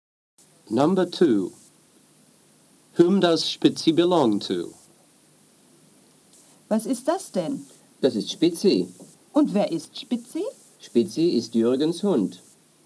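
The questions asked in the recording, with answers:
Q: Whom does Spitzi belong to?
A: Jürgen (Spitzi is Jürgen's dog)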